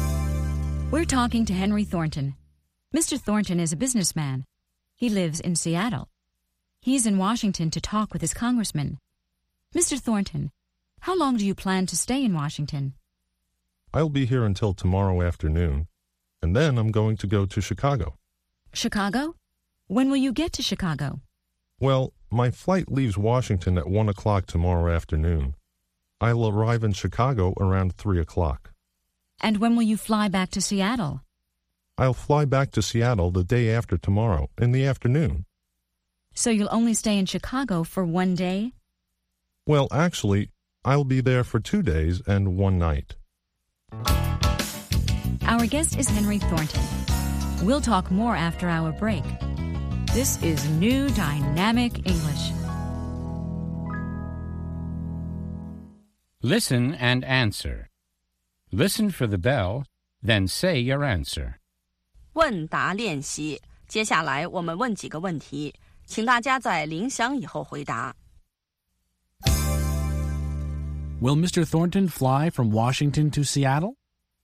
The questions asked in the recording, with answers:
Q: Will Mr. Thornton fly from Washington to Seattle?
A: No, he won't. First, he'll fly to Chicago.